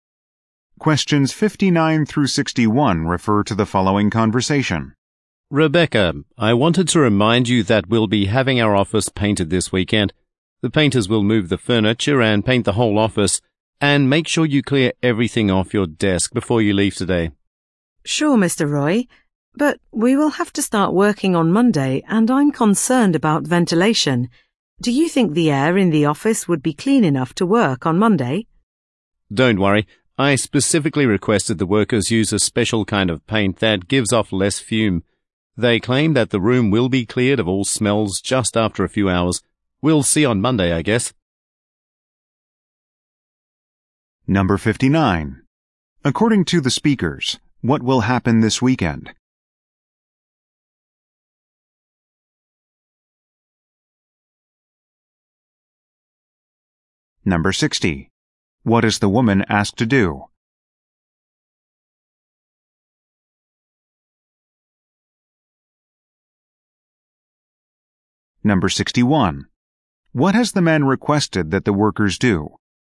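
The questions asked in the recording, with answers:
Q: According to the speakers, what will happen this weekend?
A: The office will be painted

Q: What is the woman asked to do?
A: Clear everything off her desk

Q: What has the man requested that the workers do?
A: Use a special paint with fewer fumes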